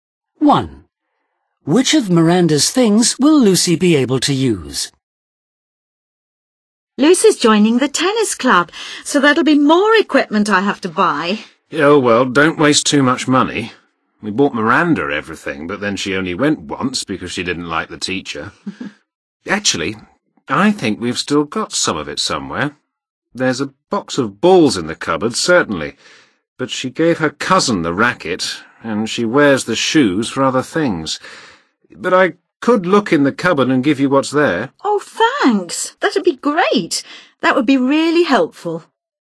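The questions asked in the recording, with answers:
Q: Which of Miranda's things will Lucy be able to use?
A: the tennis balls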